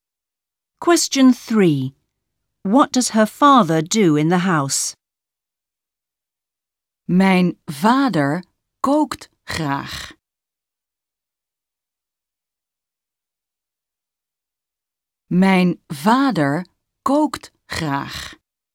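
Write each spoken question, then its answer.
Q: What does her father do in the house?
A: He cooks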